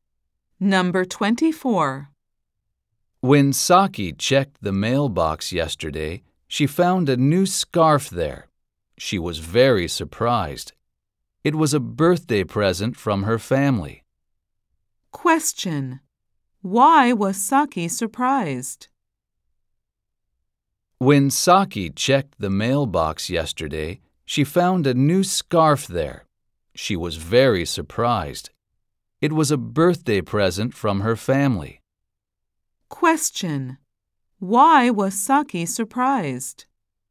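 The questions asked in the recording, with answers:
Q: Why was Saki surprised?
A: She found a new scarf (a birthday present from her family) in the mailbox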